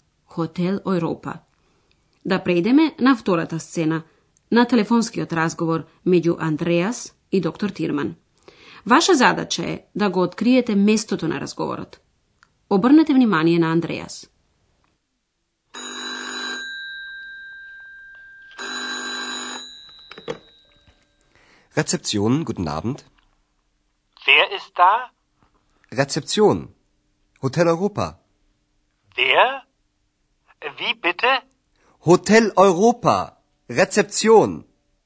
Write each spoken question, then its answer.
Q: Ваша задача е да го откриете местото на разговорот.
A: Значи, сената е Хотел Европа, а Андреас таму работи како портир.